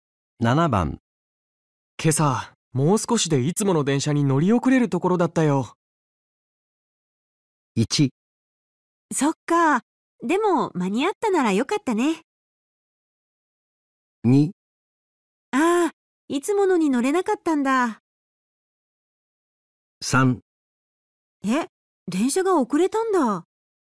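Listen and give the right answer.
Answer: 1: そっかでも間に合ったならよかったね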